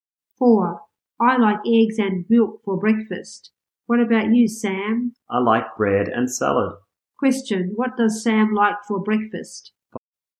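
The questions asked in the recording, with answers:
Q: What does Sam like for breakfast?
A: Bread and salad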